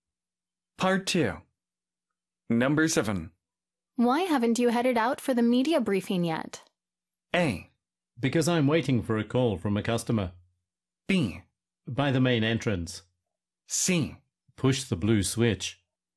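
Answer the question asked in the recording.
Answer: A: Because I'm waiting for a call from a customer.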